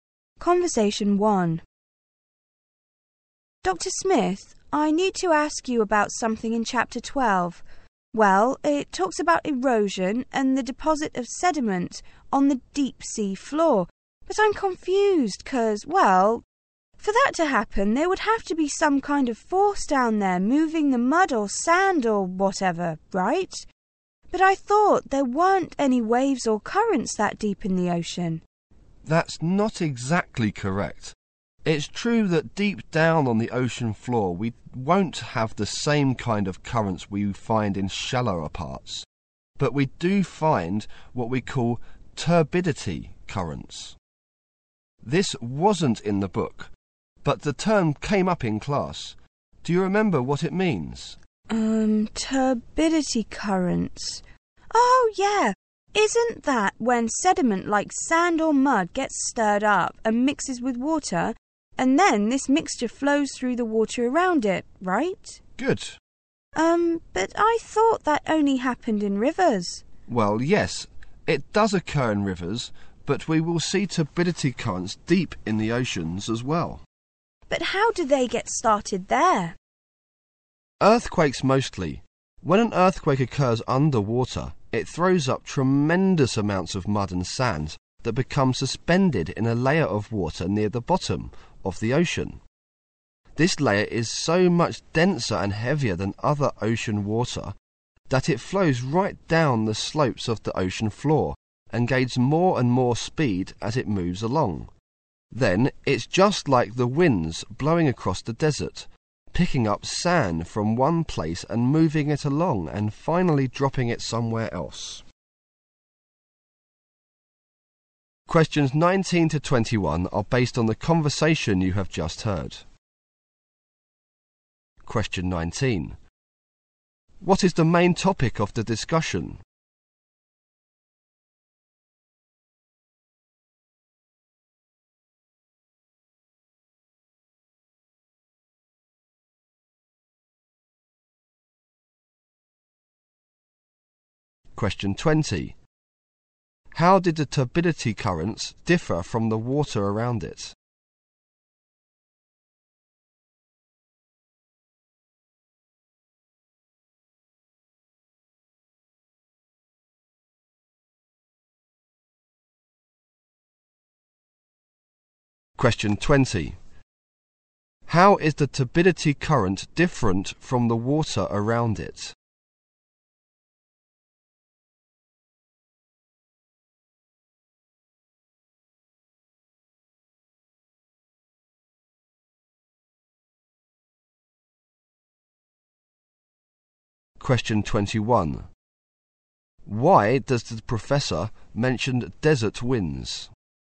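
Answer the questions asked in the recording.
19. Turbidity currents on the deep ocean floor
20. It is denser and heavier
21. To compare how turbidity currents move sediment from one place to another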